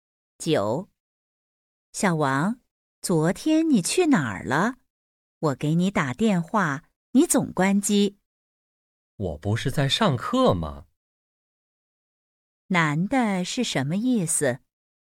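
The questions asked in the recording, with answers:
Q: 男的是什么意思?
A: 他昨天在上课,所以关机了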